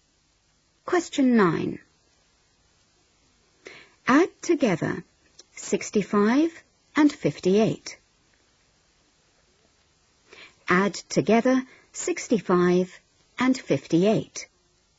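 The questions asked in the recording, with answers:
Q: Add together 65 and 58.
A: 123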